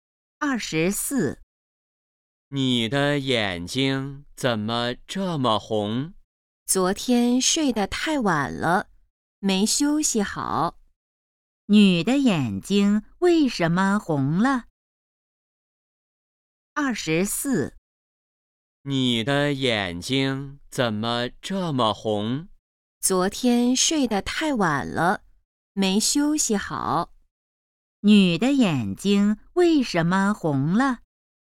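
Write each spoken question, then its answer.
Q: 女的眼睛为什么红了?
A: 昨天睡得太晚了,没休息好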